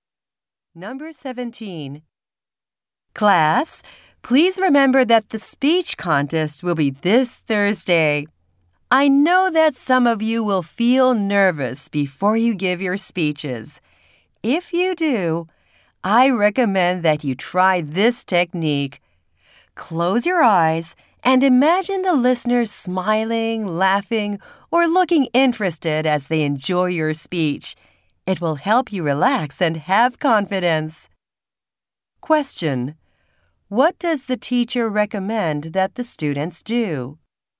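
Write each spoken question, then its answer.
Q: What does the teacher recommend that the students do?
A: Imagine the listeners enjoying their speech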